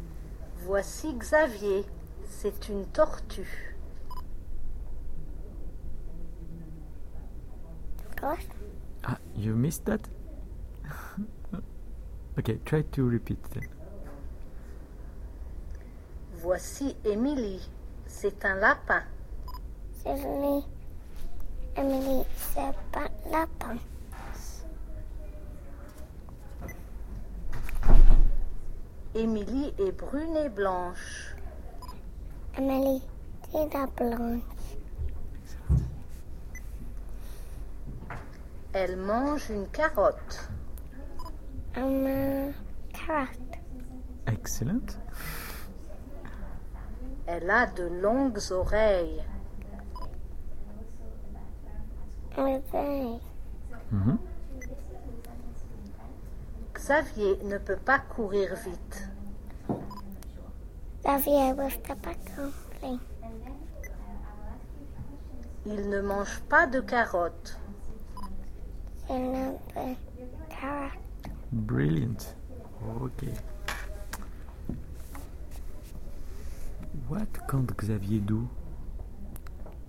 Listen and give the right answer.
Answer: Can't run.